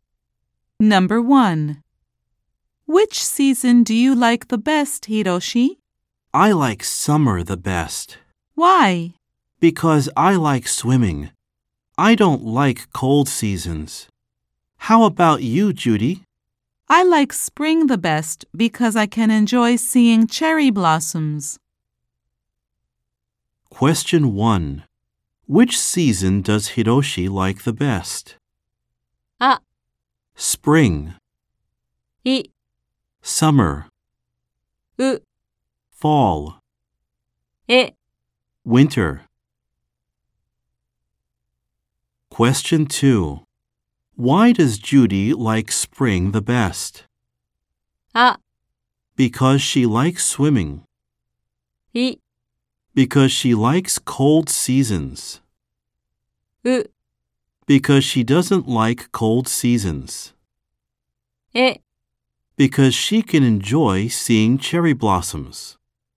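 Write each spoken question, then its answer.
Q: Which season does Hiroshi like the best?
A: い: Summer.

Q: Why does Judy like spring the best?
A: え: Because she can enjoy seeing cherry blossoms.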